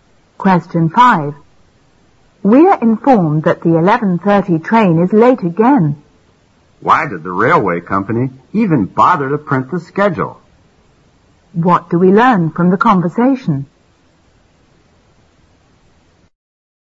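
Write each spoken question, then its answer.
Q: What do we learn from the conversation?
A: The train is often late, so the schedule is unreliable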